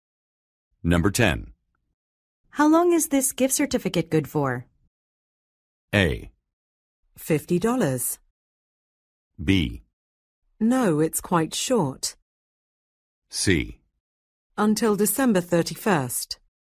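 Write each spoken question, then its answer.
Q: How long is this gift certificate good for?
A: C: Until December 31st.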